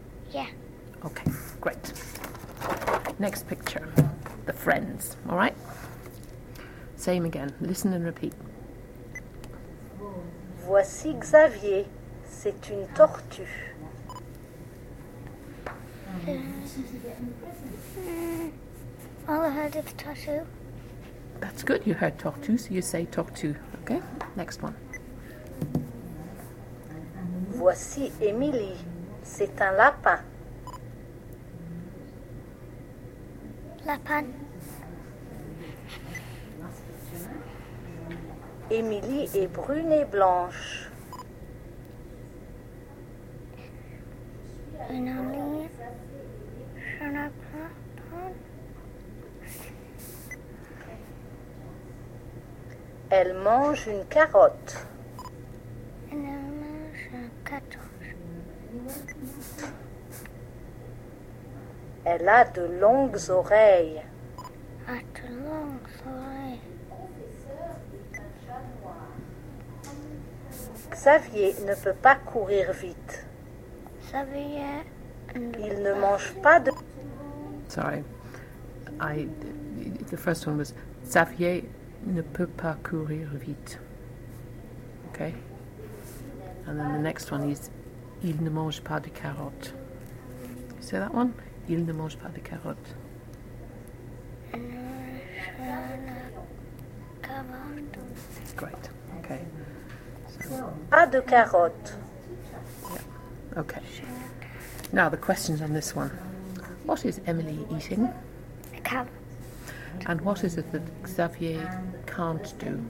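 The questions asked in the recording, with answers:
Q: What is Emily eating?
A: A carrot

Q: And what is it that Xavier can't do?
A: Run fast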